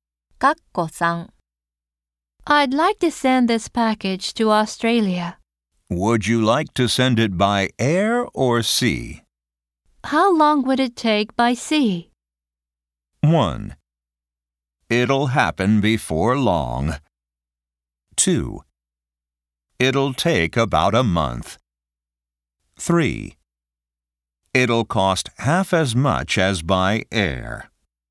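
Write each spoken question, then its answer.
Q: How long would it take by sea?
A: 2: It'll take about a month.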